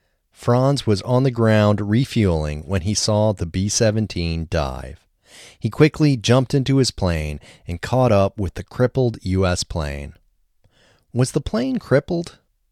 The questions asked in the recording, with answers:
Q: Was the plane crippled?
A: Yes, the plane was crippled.